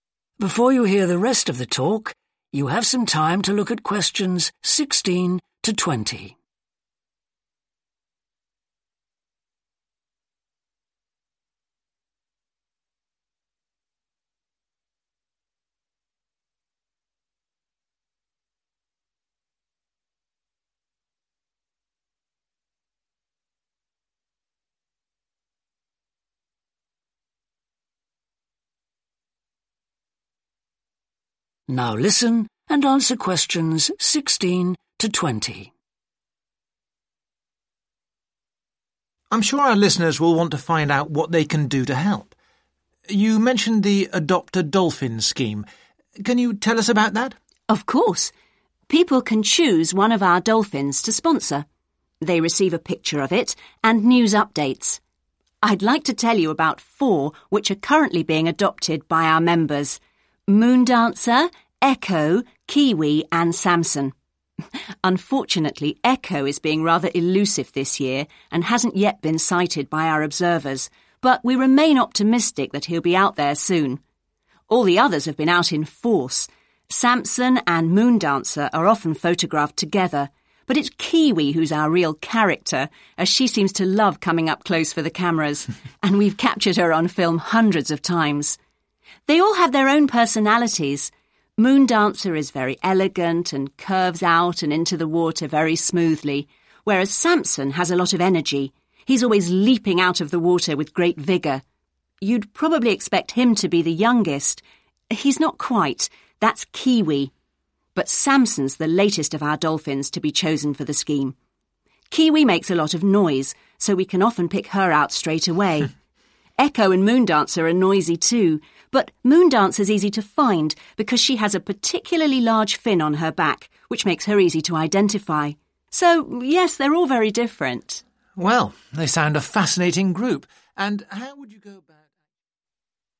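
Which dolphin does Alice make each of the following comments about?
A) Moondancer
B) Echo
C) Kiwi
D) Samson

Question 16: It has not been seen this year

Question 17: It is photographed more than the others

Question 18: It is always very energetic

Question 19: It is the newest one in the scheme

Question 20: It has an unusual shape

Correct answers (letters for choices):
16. B
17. C
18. D
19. D
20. A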